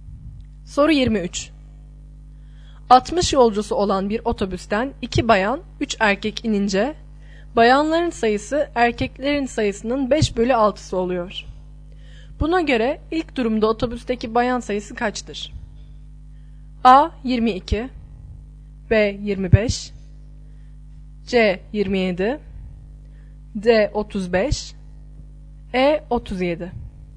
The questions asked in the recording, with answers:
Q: Buna göre ilk durumda otobüsteki bayan sayısı kaçtır?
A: Doğru yanıt C şıkkı.